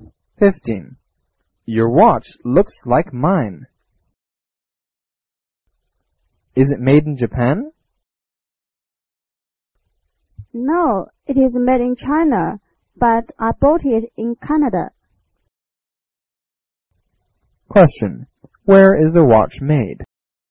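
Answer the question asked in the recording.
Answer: In China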